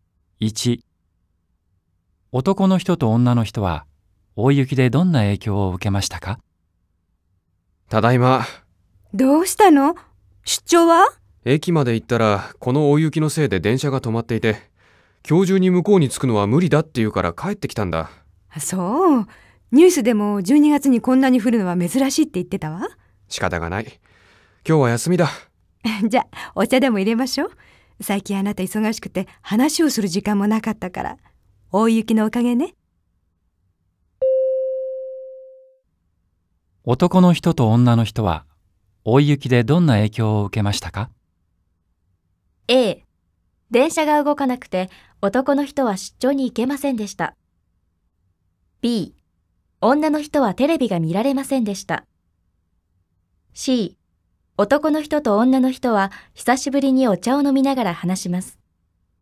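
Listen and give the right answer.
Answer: A: ○(電車が動かなくて男の人は出張に行けませんでした)、B: ×、C: ○(久しぶりにお茶を飲みながら話します)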